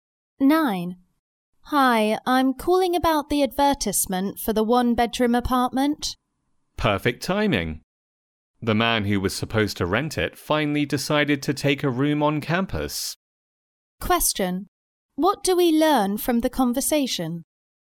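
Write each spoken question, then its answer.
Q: What do we learn from the conversation?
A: The apartment is still available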